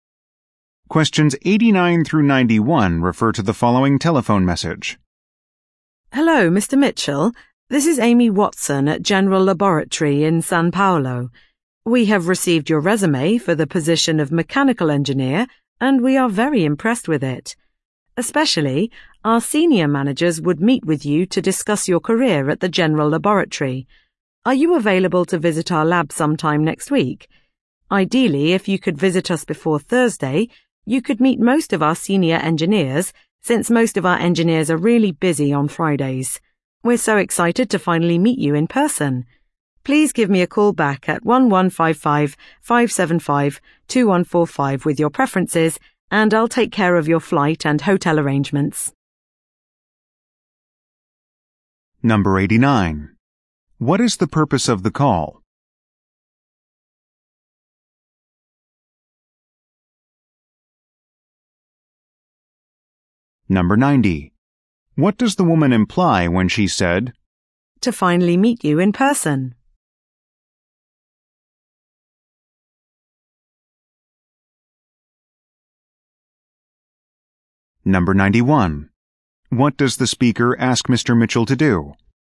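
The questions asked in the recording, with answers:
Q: What is the purpose of the call?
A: To invite Mr. Mitchell to visit for an interview

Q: What does the speaker ask Mr.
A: Call her back with his preferred dates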